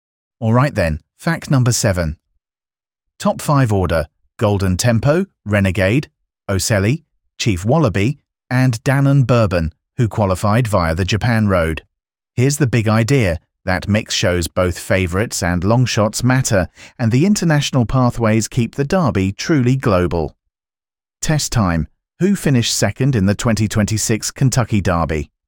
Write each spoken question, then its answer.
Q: Who finished second in the 2026 Kentucky Derby?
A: Correct answer. Renegade.